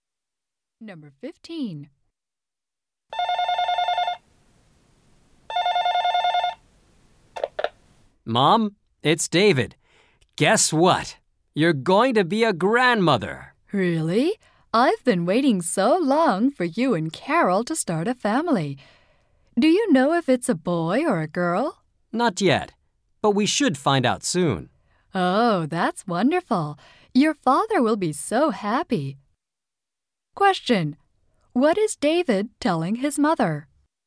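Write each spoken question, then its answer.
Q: What is David telling his mother?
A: He and Carol are going to have a baby.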